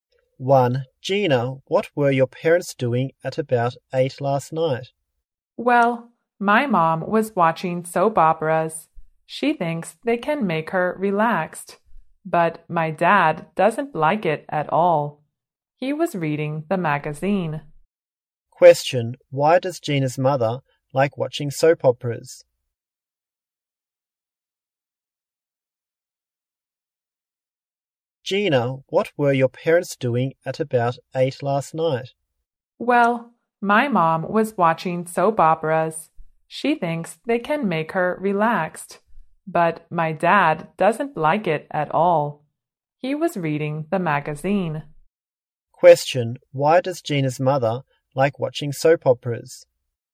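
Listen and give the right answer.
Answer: They make her relaxed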